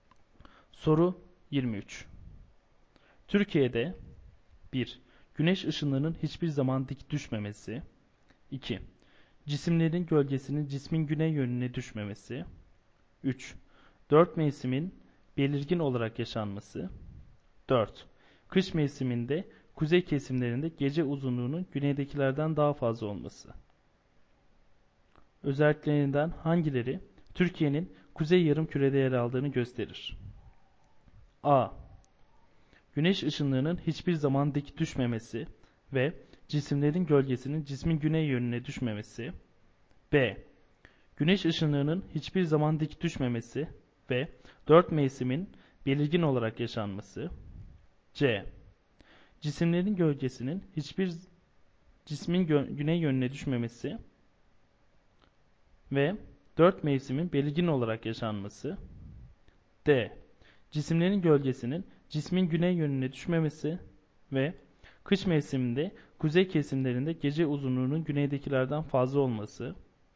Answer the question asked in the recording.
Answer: Doğru yanıt D şıkkı.